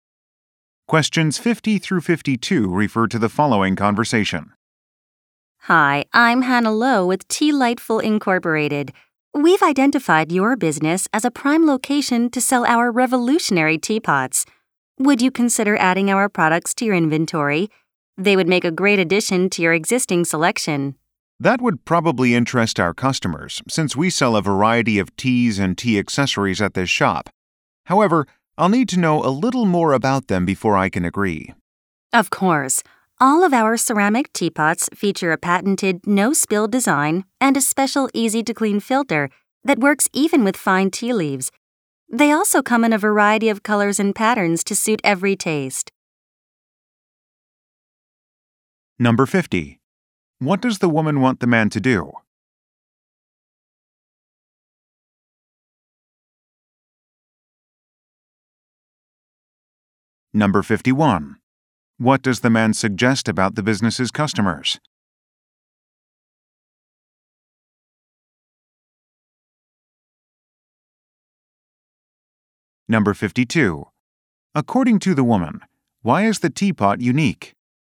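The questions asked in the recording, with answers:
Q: What does the woman want the man to do?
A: Sell her company's teapots in his shop

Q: According to the woman, why is the teapot unique?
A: It has a patented no-spill design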